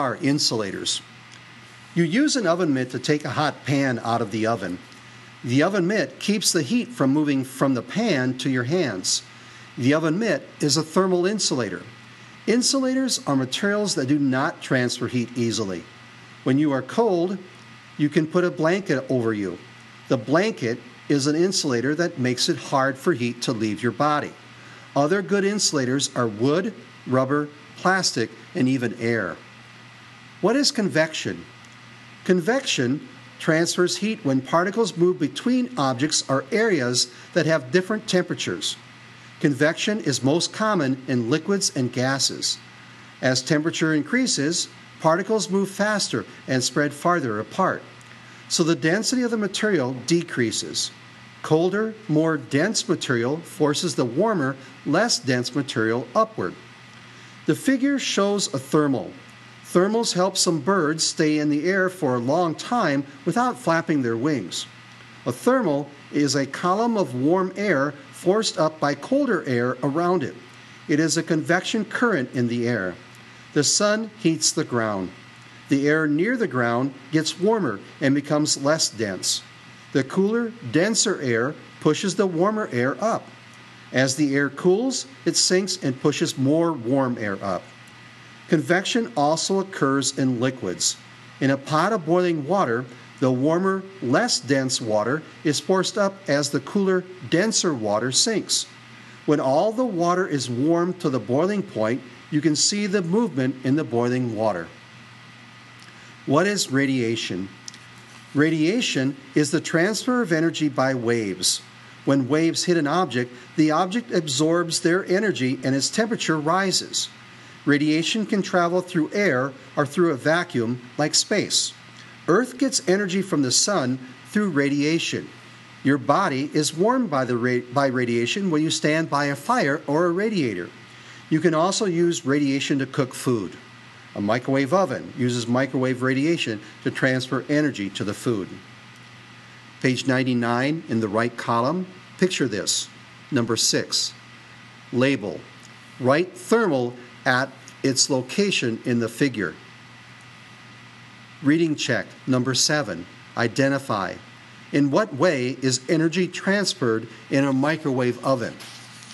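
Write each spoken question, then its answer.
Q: In what way is energy transferred in a microwave oven?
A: By radiation (microwave radiation)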